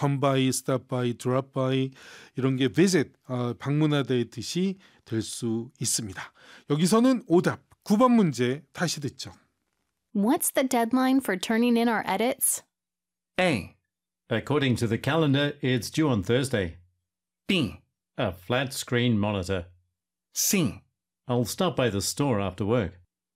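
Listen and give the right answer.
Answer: A: According to the calendar, it's due on Thursday.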